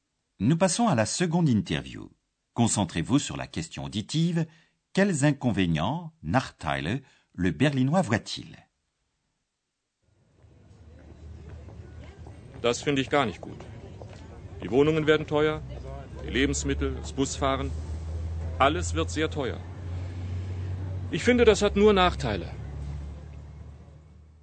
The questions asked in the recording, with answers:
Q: Quels inconvénients, Nachteile, le berlinois voit-il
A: Selon le Berlinois, il y a un gros désavantage, tout va devenir très cher.